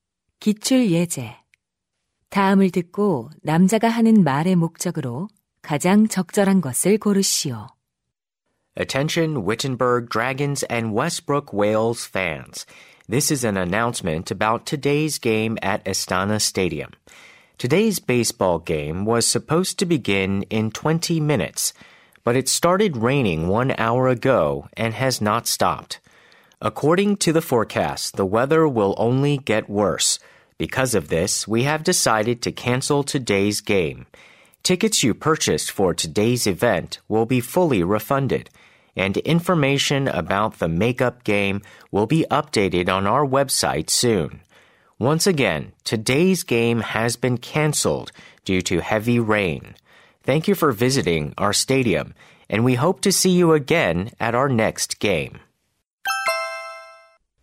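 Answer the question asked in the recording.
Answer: 비 때문에 오늘 야구 경기가 취소되었음을 알리려고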